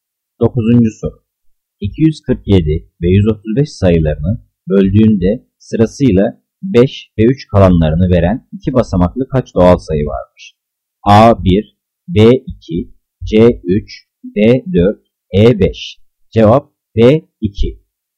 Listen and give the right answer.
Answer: Cevap B 2.